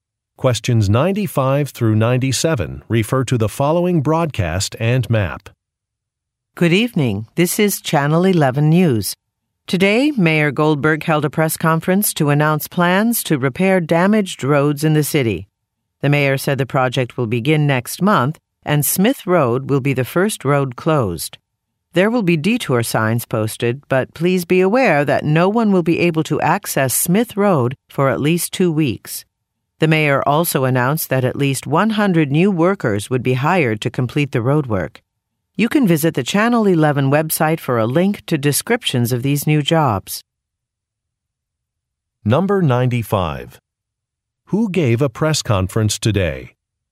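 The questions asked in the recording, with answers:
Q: Who gave a press conference today?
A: Mayor Goldberg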